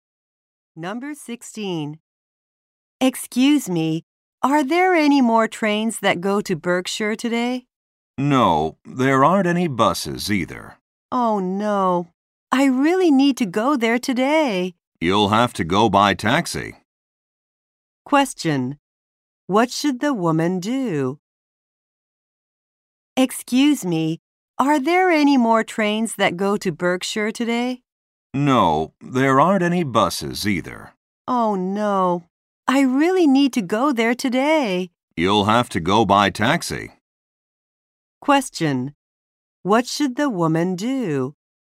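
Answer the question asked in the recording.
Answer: Take a taxi.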